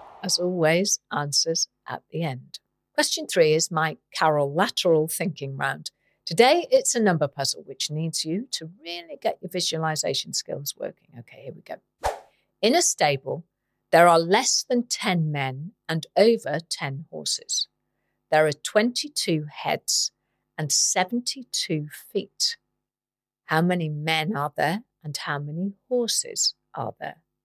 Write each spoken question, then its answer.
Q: How many men are there and how many horses are there?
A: The answer is, there are 8 men and 14 horses.